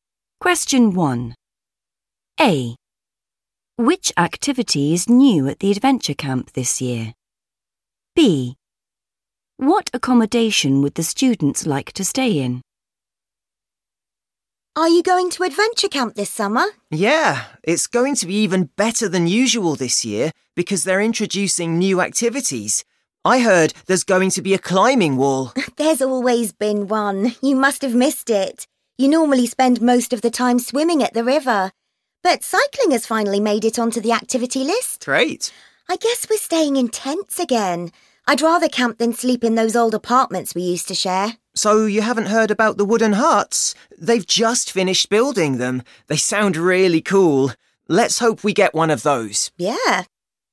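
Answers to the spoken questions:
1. cycling
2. wooden huts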